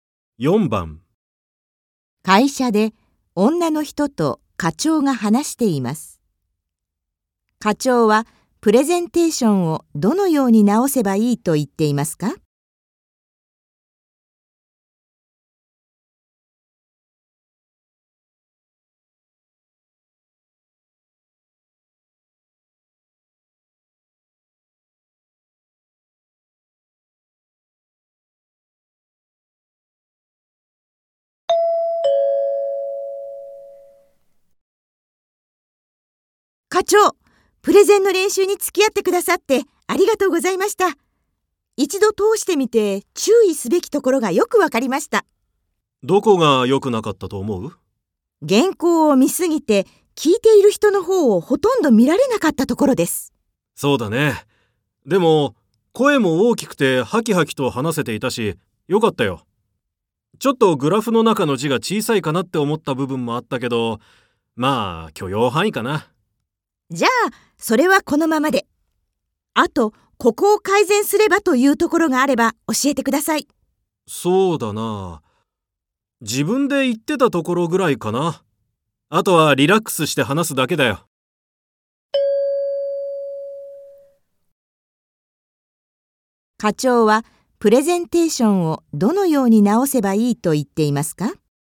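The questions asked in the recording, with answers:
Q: 課長はプレゼンテーションをどのように直せばいいと言っていますか?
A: 原稿ばかり見ないで、聞いている人の方を見て話す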